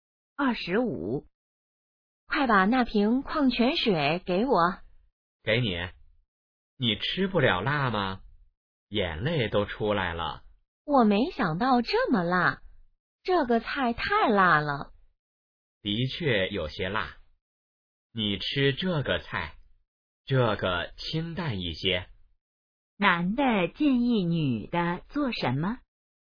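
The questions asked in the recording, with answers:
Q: 男的建议女的做什么?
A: 吃清淡一些的菜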